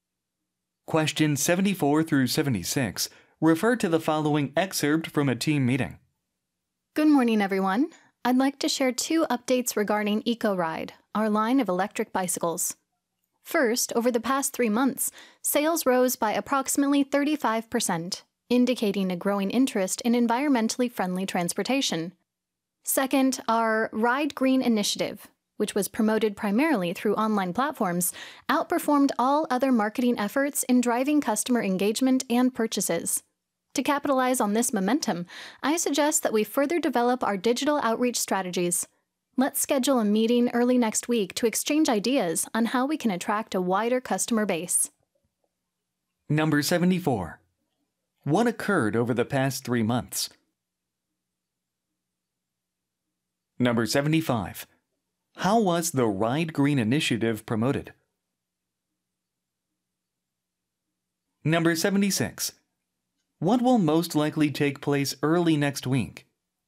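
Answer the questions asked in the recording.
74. Sales rose by about 35%
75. Through online platforms
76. A meeting to exchange ideas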